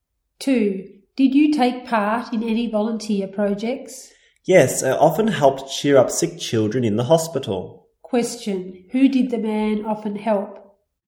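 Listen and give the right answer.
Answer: Sick children in the hospital.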